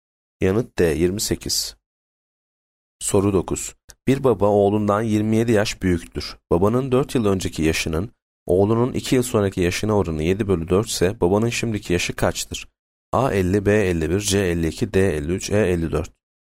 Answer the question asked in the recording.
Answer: Yanıt D 53.